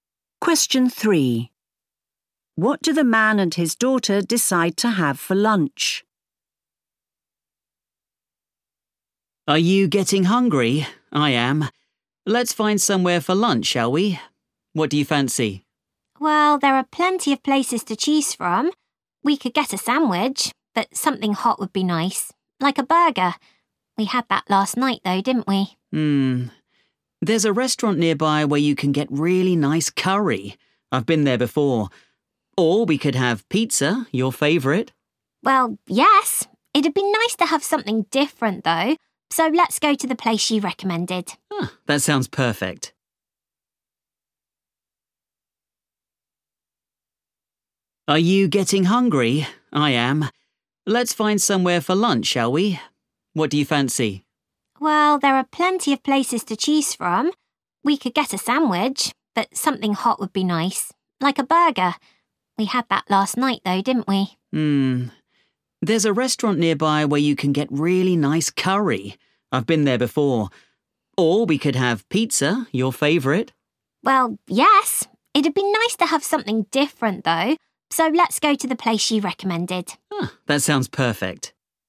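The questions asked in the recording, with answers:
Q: What do the man and his daughter decide to have for lunch?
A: curry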